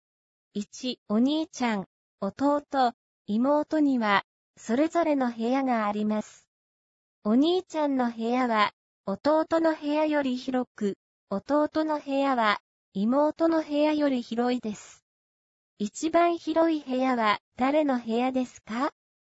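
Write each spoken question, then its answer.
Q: 一番広い部屋は、誰の部屋ですか?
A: お兄ちゃん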